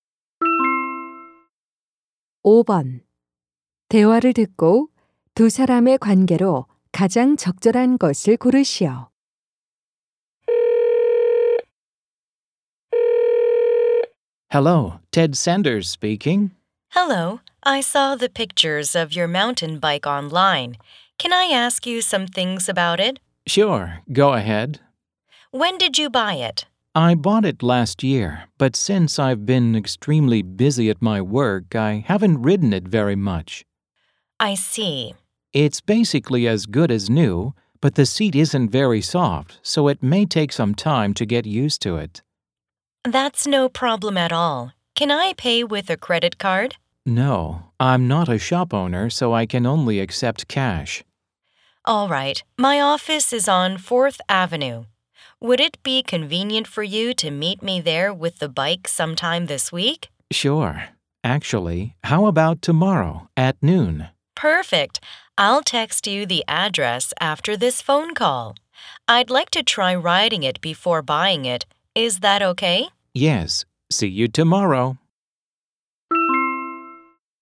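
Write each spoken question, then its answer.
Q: 대화를 듣고 두 사람의 관계로 가장 적절한 것을 고르시오.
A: 중고 자전거 판매자와 구매자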